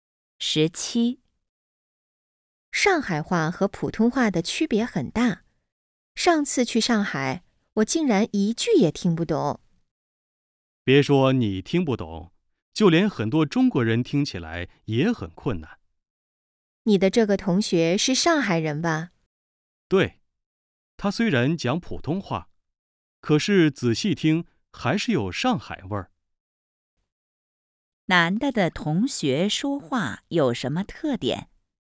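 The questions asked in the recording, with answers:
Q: 男的的同学说话有什么特点?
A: 讲普通话,但有上海味儿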